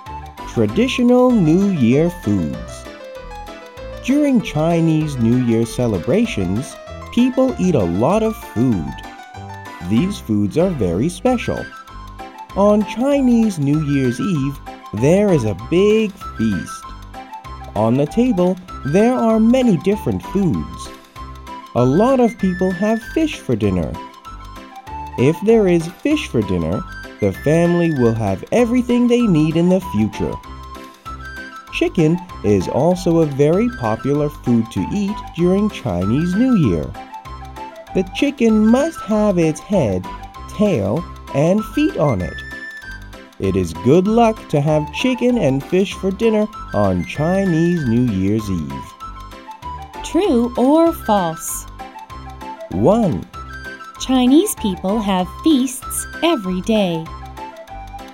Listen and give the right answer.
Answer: False. Chinese people have feasts on Chinese New Year's Eve.